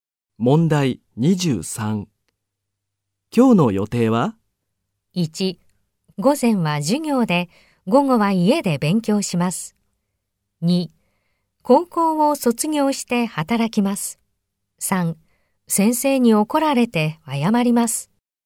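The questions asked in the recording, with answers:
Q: 今日の予定は?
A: 2: 午前は授業で、午後は家で勉強します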